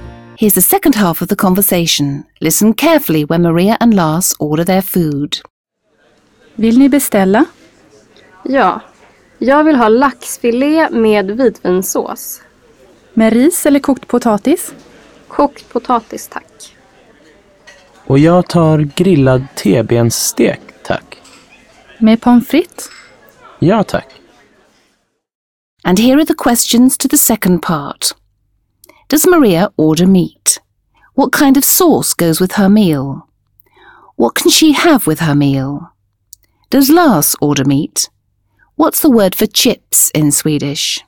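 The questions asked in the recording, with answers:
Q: Does Maria order meat?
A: No, she orders salmon fillet (laxfilé)

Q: What kind of sauce goes with her meal?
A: White wine sauce (vitvinsås)

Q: What can she have with her meal?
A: Rice or boiled potatoes (she chooses boiled potatoes)

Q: Does Lars order meat?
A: Yes, grilled T-bone steak

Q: What's the word for chips in Swedish?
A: Pommes frites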